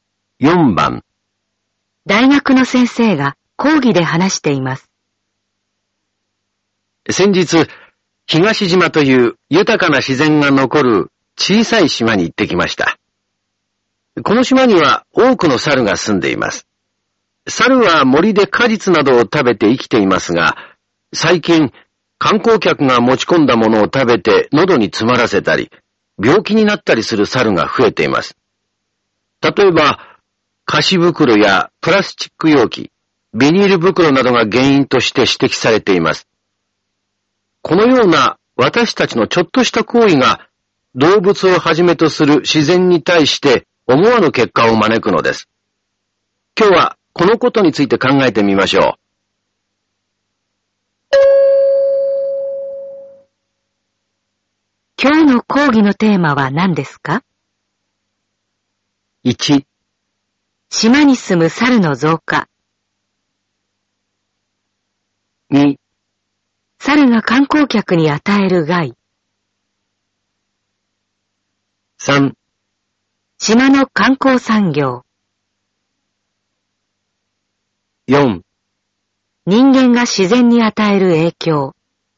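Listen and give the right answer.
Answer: 4: 人間が自然に与える影響。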